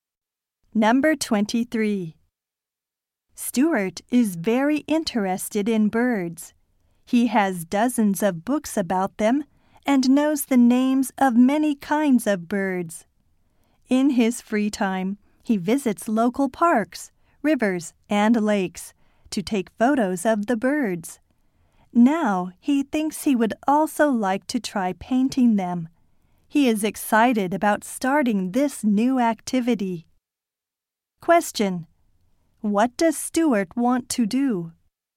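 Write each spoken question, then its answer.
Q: What does Stuart want to do?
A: Paint birds.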